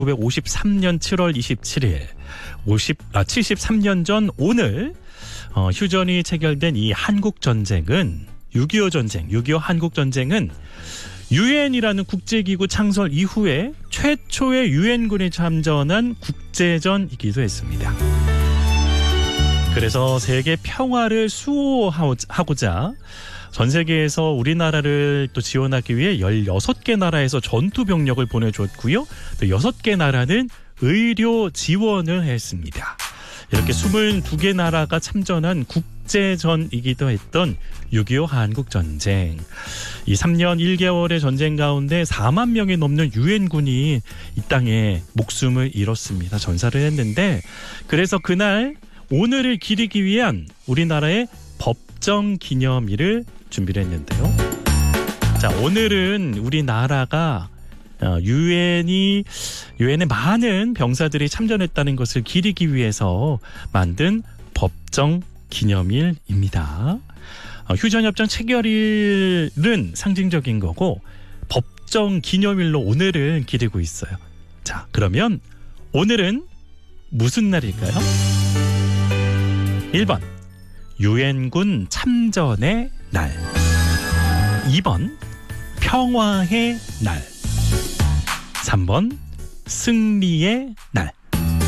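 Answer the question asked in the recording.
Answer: 1: 유엔군 참전의 날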